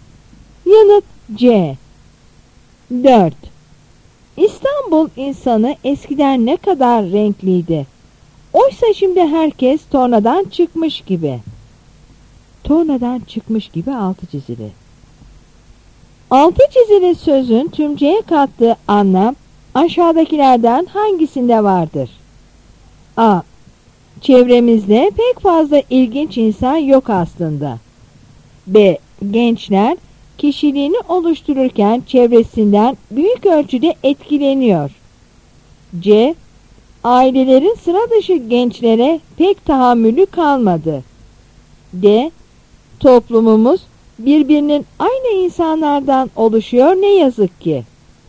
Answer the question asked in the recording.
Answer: Yanıt D.